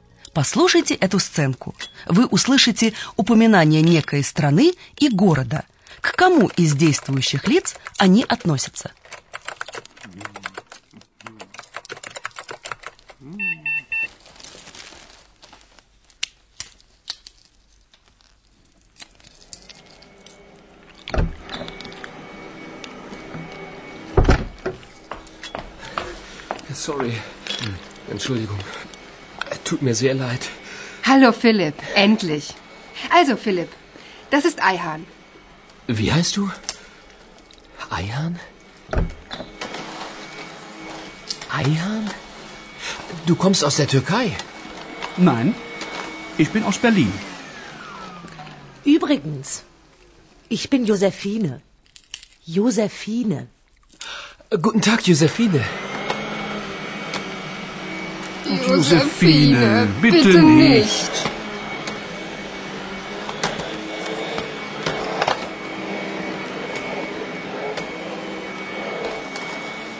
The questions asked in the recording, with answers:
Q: К кому из действующих лиц они относятся?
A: Филипп с любопытством смотрит на своего нового коллегу с необычным именем и спрашивает его, не из Турции ли он.